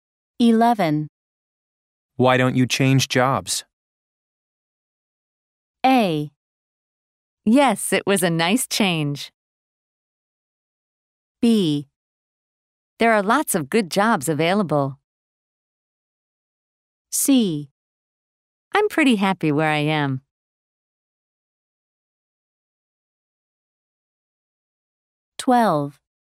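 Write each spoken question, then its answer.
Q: Why don't you change jobs?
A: C: I'm pretty happy where I am.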